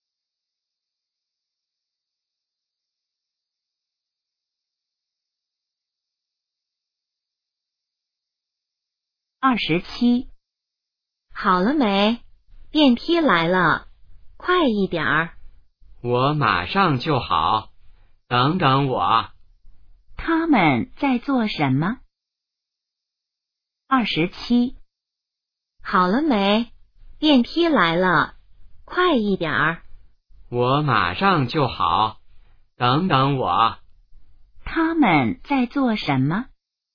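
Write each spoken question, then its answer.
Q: 他们在做什么?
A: 等电梯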